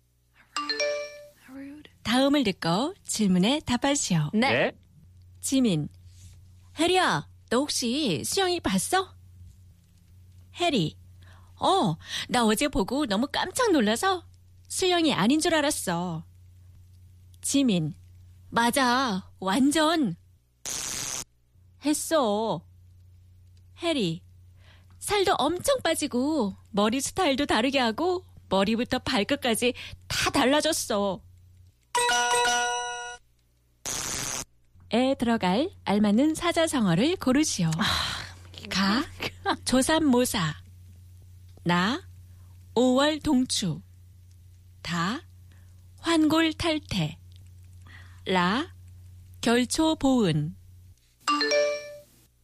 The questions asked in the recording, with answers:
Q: 에 들어갈 알맞는 사자성어를 고르시오.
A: It was 환골탈태.